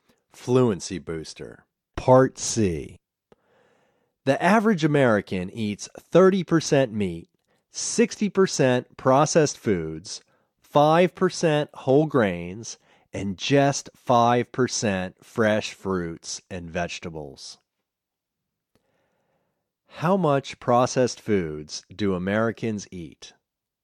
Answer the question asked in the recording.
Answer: Americans eat 60% processed foods.